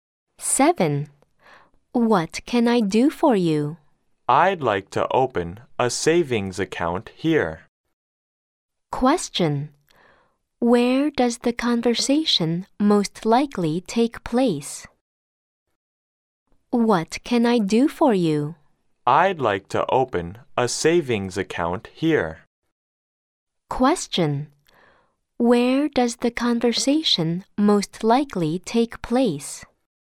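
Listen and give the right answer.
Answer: In a bank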